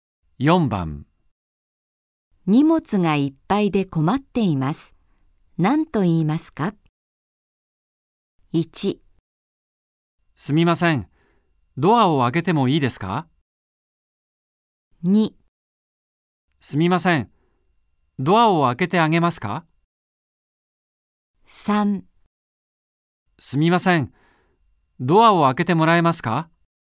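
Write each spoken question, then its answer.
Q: 荷物がいっぱいで困っています。何と言いますか?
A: 3: すみません、ドアを開けてもらえますか?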